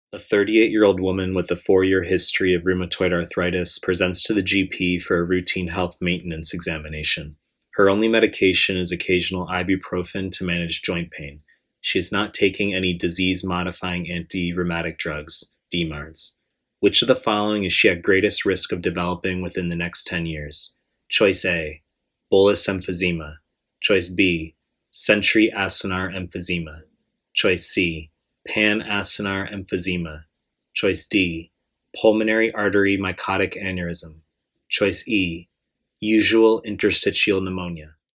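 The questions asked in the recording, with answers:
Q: Which of the following is she at greatest risk of developing within the next 10 years?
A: E: usual interstitial pneumonia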